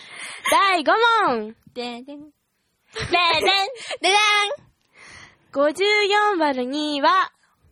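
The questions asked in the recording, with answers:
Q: 54÷2 は、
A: 27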